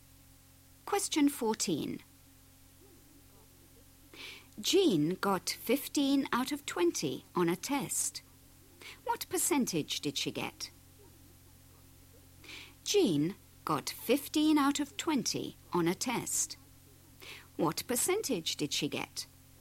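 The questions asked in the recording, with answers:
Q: What percentage did she get?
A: 75%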